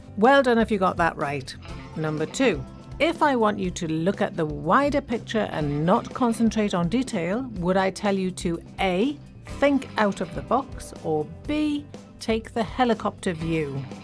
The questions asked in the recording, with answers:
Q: If I want you to look at the wider picture and not concentrate on detail, would I tell you to A, think out of the box, or B, take the helicopter view?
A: And it's B, take the helicopter view.